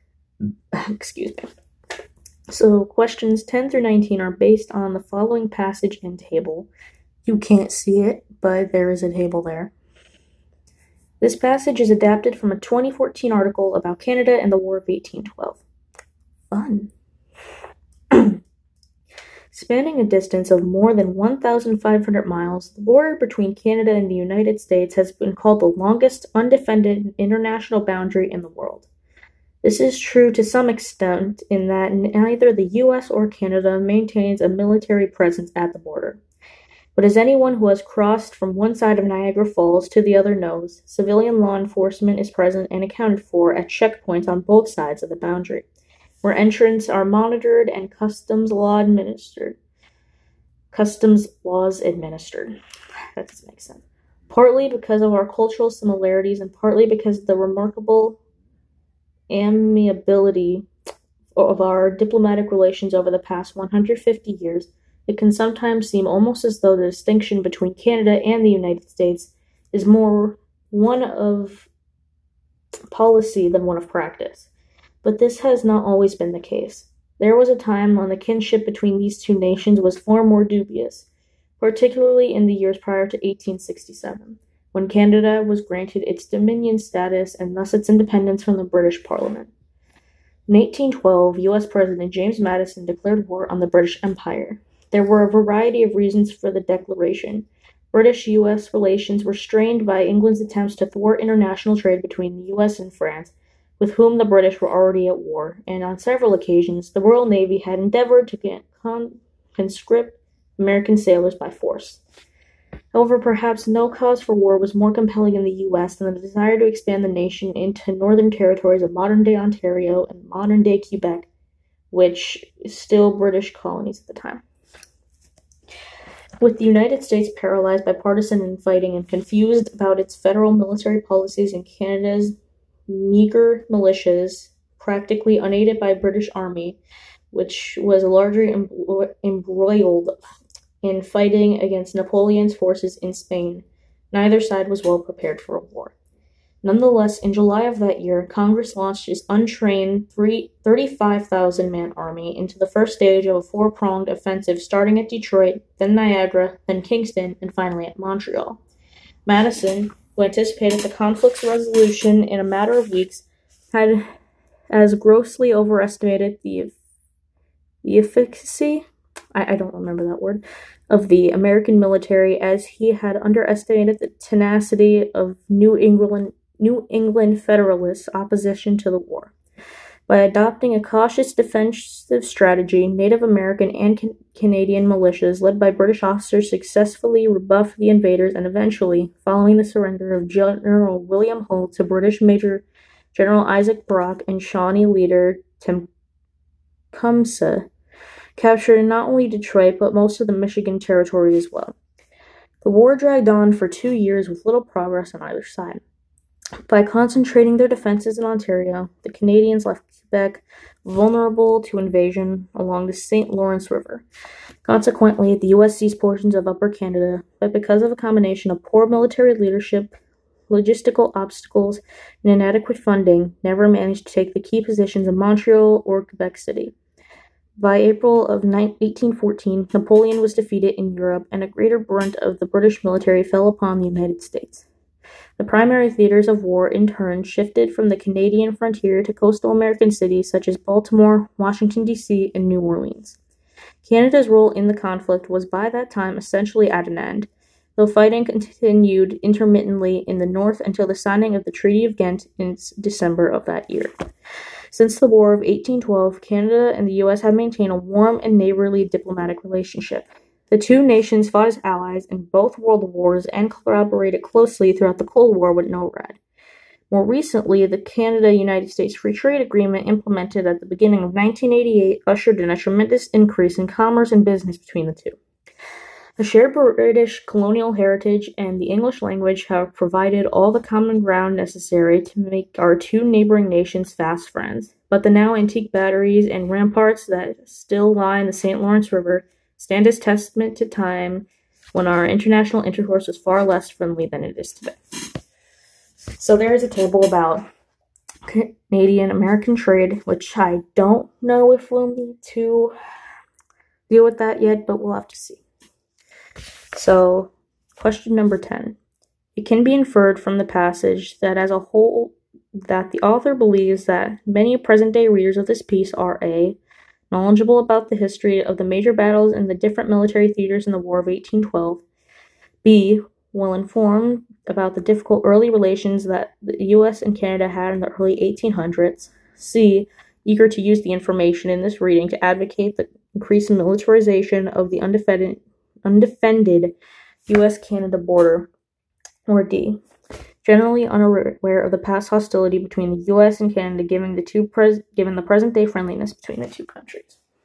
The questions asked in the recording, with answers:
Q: It can be inferred from the passage that as a whole, that the author believes that many present-day readers of this piece are A, knowledgeable about the history of the major battles in the different military theaters in the War of 1812, B, well-informed about the difficult early relations that the U.S. and Canada had in the early 1800s, C, eager to use the information in this reading to advocate the increased militarization of the undefended U.S.-Canada border, or D, generally unaware of the past hostility between the U.S. and Canada given the present-day friendliness between the two countries.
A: It's gotta be D.